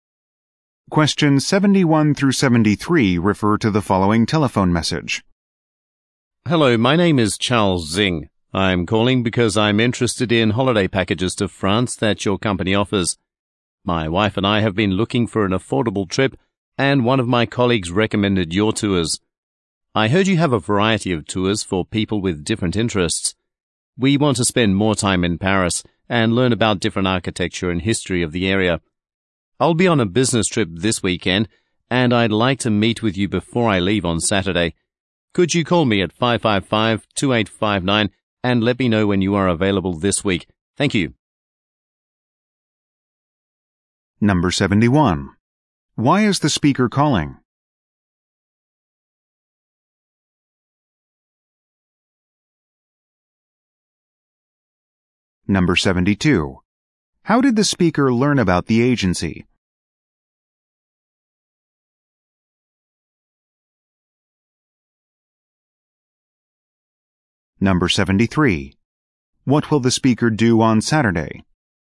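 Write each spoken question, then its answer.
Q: Why is the speaker calling?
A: To ask about holiday packages to France

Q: How did the speaker learn about the agency?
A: A colleague recommended it

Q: What will the speaker do on Saturday?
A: Leave on a business trip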